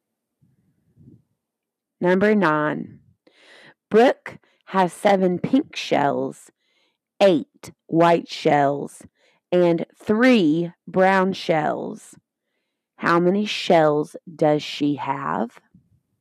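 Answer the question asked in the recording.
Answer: 18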